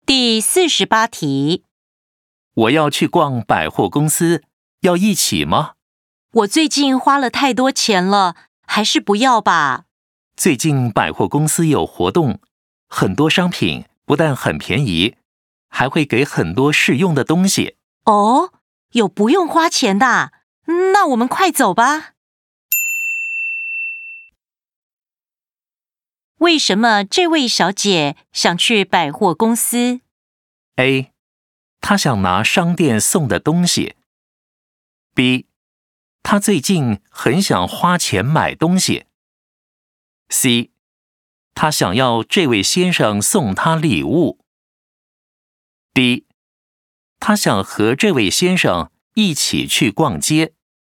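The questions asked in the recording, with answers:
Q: 为什么这位小姐想去百货公司?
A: A: 她想拿商店送的东西。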